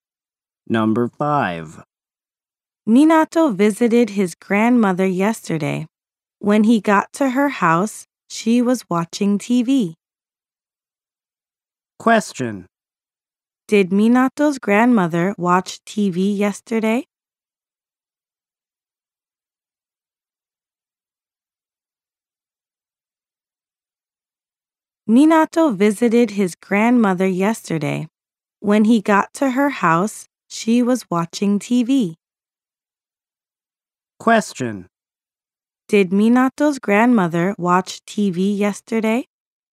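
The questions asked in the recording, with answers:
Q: Did Minato's grandmother watch TV yesterday?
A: Yes, she did.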